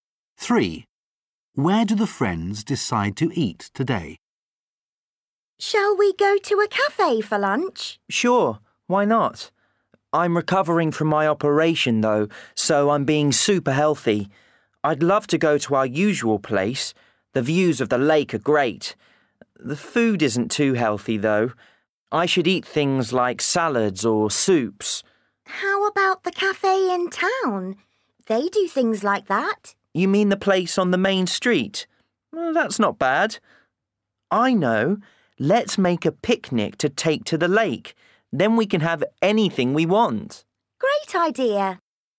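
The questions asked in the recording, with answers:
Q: Where do the friends decide to eat today?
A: At the lake (a picnic)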